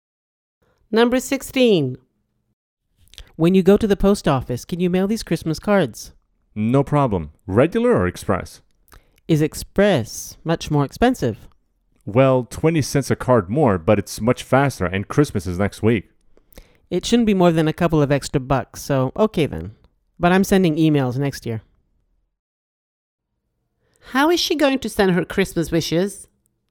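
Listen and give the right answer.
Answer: by express mail (cards)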